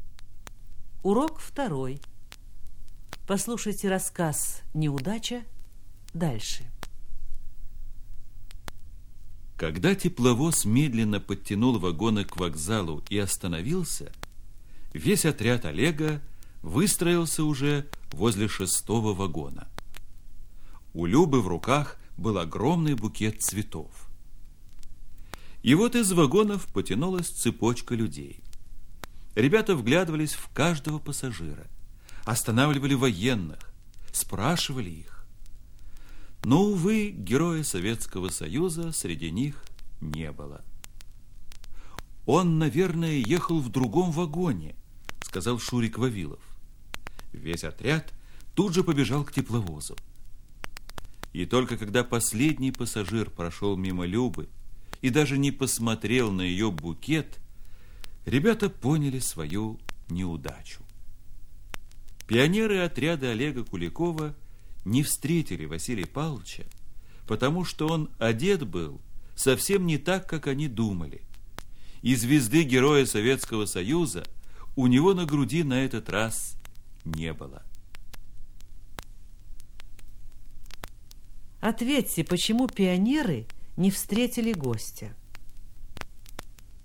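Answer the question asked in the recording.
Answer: Он был одет не так, как они думали, и на груди у него не было звезды Героя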